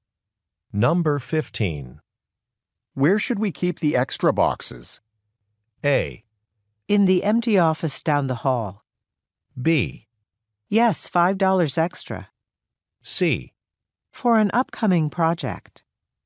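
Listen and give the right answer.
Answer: A: In the empty office down the hall.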